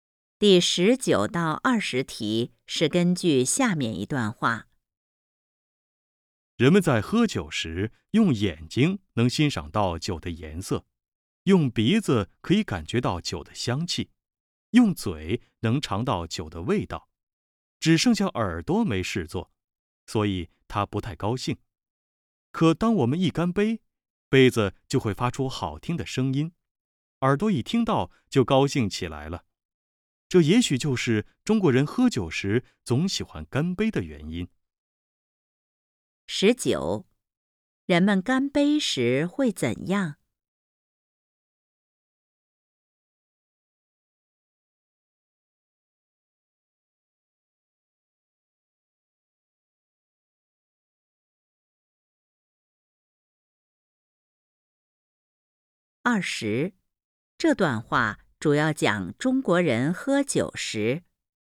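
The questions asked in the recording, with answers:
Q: 人们干杯时会怎样?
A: 杯子发出好听的声音,耳朵高兴起来

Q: 这段话主要讲中国人喝酒时。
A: 为什么喜欢干杯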